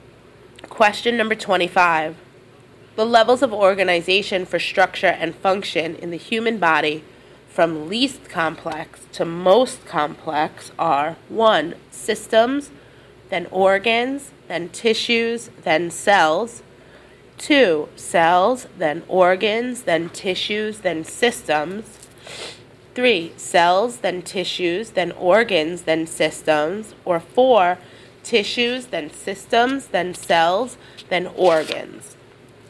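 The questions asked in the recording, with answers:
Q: The levels of organization for structure and function in the human body from least complex to most complex are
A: 3: Cells, then tissues, then organs, then systems.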